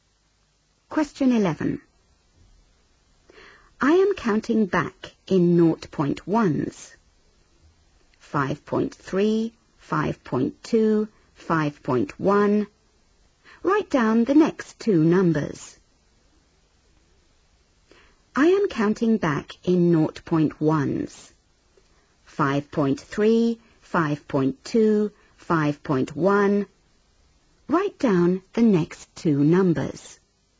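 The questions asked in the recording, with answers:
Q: Write down the next two numbers.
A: 5.0, 4.9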